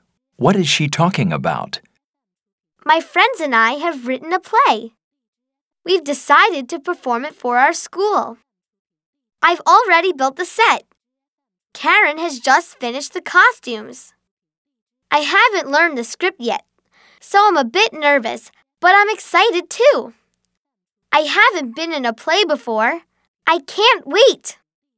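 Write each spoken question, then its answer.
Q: What is she talking about?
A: A play she and her friends wrote and will perform for their school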